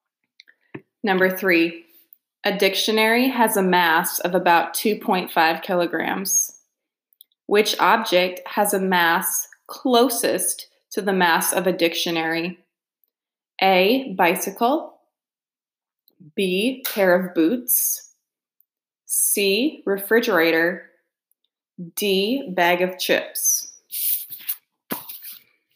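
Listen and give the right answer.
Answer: B: pair of boots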